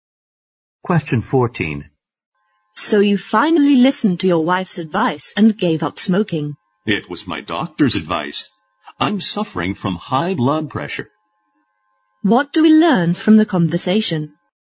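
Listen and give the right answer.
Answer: The man gave up smoking on his doctor's advice because he has high blood pressure.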